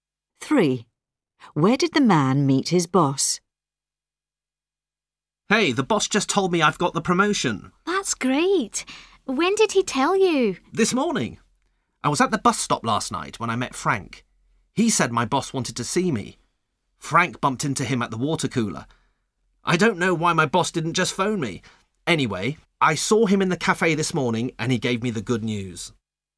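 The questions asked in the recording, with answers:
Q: Where did the man meet his boss?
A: In the cafe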